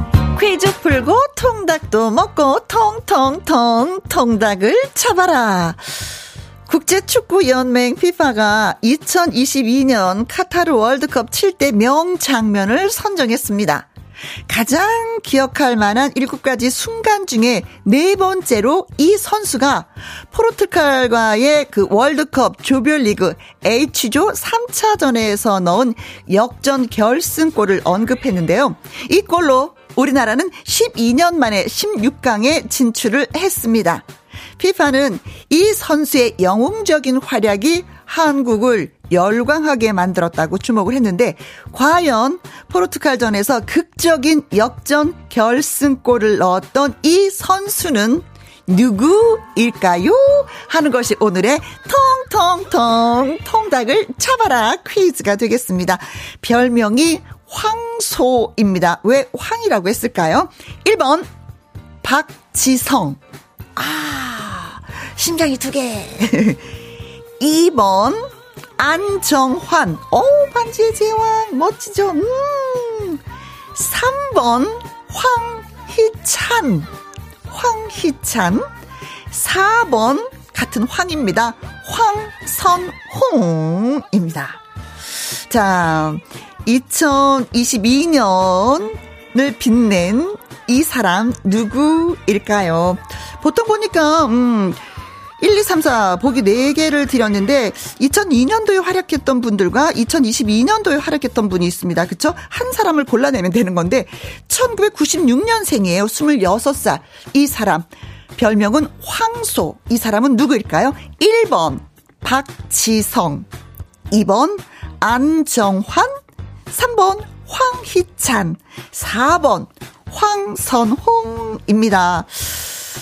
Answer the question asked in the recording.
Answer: 3번 황희찬입니다.